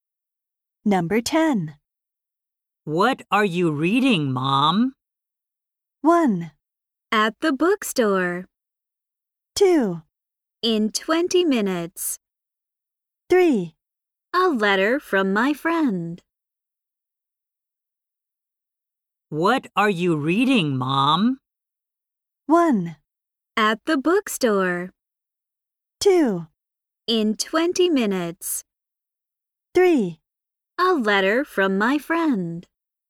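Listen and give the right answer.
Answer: 3: A letter from my friend.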